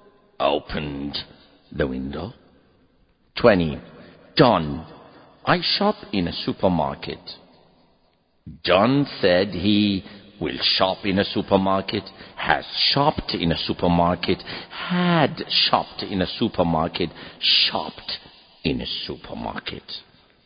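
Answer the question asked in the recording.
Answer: D: shopped in a supermarket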